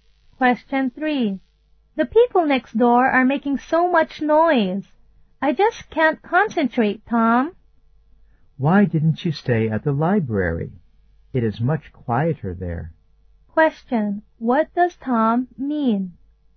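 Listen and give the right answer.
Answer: She should go and study at the library, where it's quieter.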